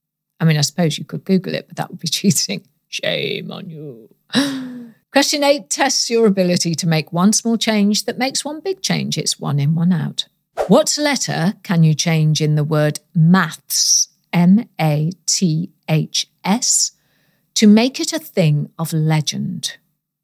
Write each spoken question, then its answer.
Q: What letter can you change in the word maths, M-A-T-H-S, to make it a thing of legend?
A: Well, if you change the letter A to a letter Y, you get the word myths, M-Y-T-H-S.